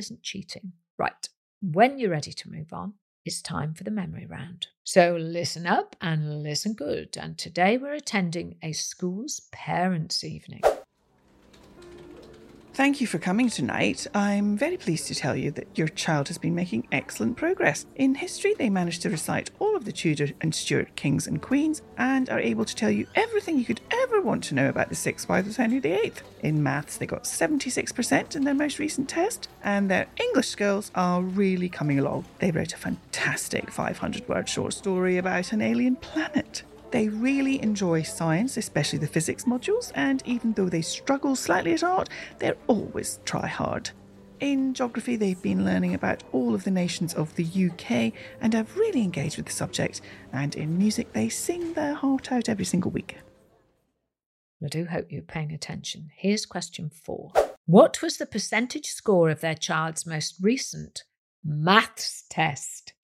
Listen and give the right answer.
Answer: And the answer was 76%, which is a respectable score.